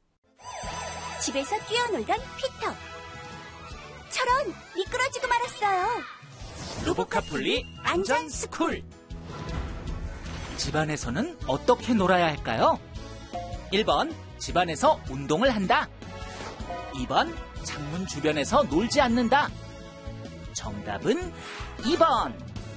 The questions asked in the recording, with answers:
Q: 집안에서는 어떻게 놀아야 할까요?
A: 정답은 2번.